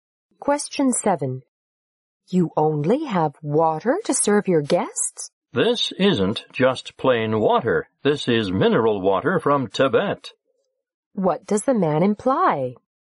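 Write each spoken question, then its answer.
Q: What does the man imply?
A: The water is special: mineral water from Tibet.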